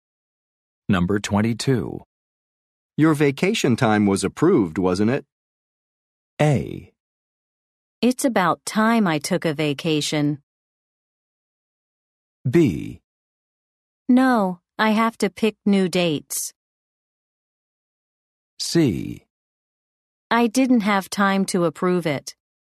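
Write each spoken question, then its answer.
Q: Your vacation time was approved, wasn't it?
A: B: No, I have to pick new dates.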